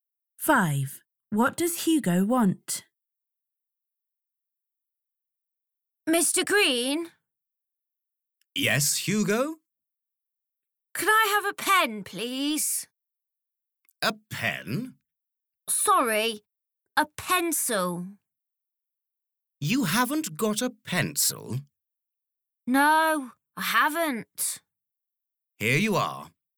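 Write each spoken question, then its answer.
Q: What does Hugo want?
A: a pencil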